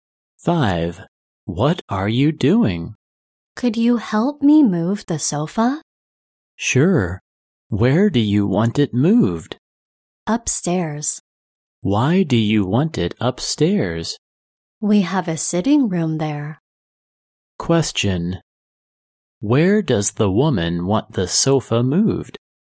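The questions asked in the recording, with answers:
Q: Where does the woman want the sofa moved?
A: Upstairs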